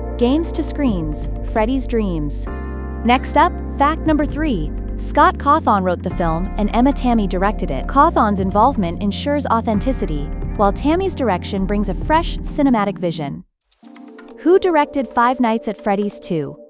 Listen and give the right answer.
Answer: Correct answer. Emma Tammy.